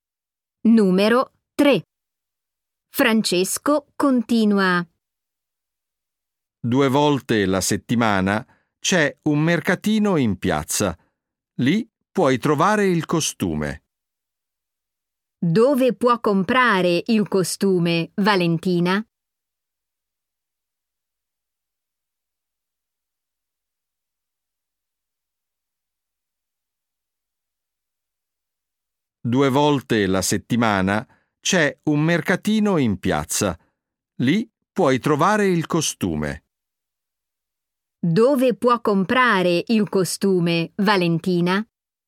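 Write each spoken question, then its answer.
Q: Dove può comprare il costume, Valentina?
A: Al mercatino in piazza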